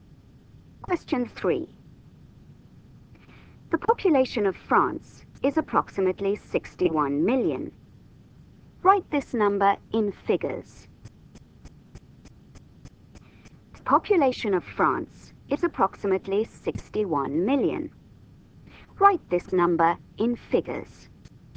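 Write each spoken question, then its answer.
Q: The population of France is approximately 61 million. Write this number in figures.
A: 61,000,000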